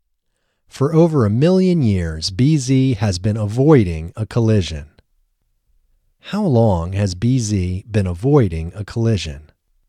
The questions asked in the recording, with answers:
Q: How long has BZ been avoiding a collision?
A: BZ has been avoiding a collision for over a million years.